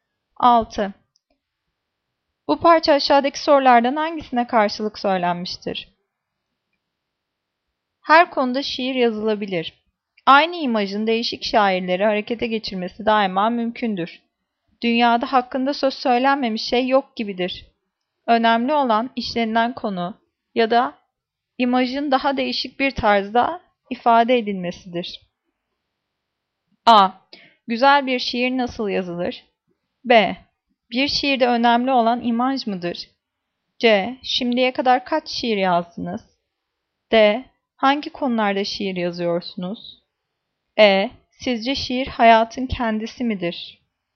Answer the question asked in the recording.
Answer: Cevap D. Hangi konularda şiir yazıyorsunuz?